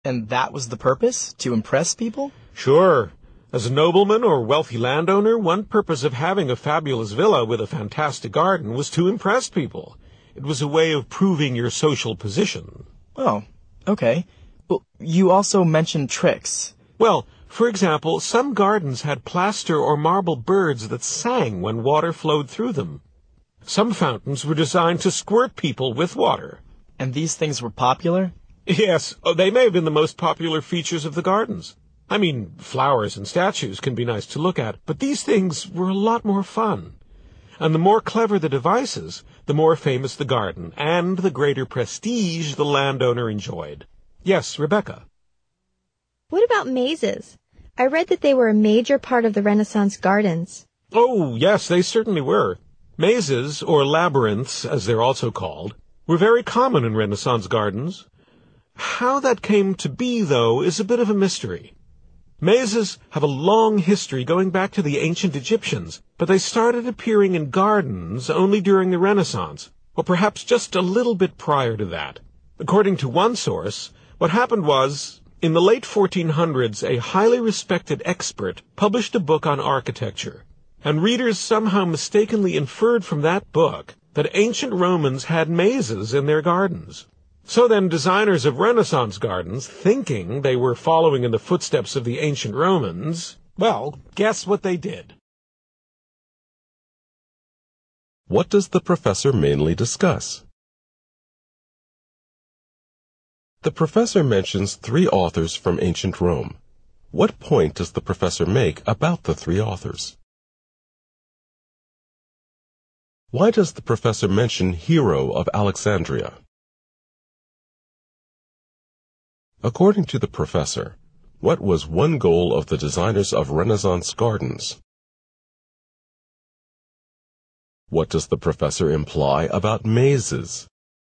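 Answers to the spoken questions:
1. To impress people and show the owner's social position
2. They were added to gardens because people wrongly believed ancient Romans had mazes in their gardens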